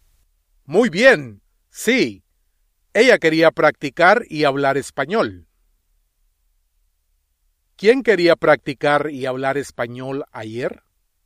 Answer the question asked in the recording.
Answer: Ana.